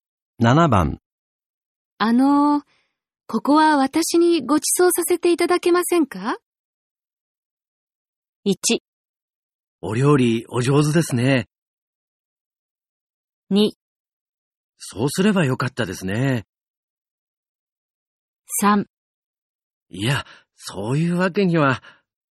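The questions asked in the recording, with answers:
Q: ここは私にご馳走させていただけませんか?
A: 3: いや、そういうわけには。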